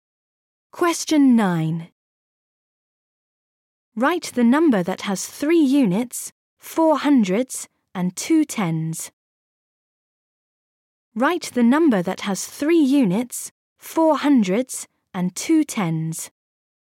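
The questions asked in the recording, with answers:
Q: Write the number that has 3 units, 4 hundreds, and 2 tens.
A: 423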